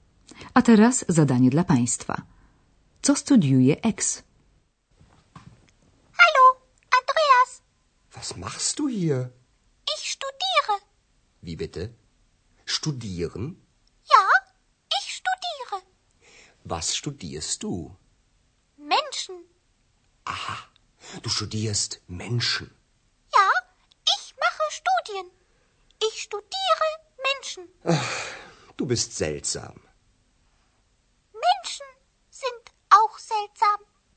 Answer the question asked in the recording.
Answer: Ex studiuje zatem ludzi.